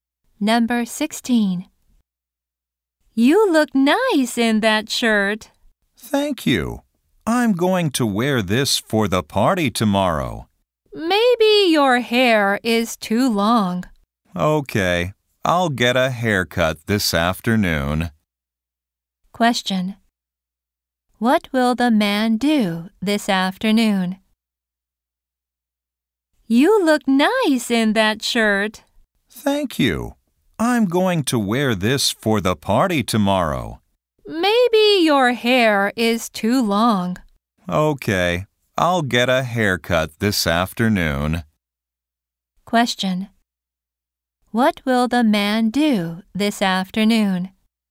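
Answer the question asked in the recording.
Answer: Get a haircut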